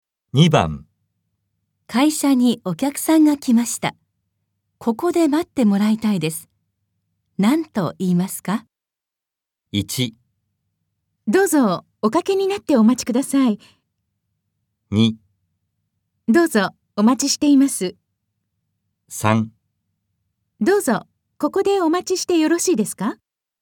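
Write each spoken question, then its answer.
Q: 何と言いますか?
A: 1: どうぞおかけになってお待ちください。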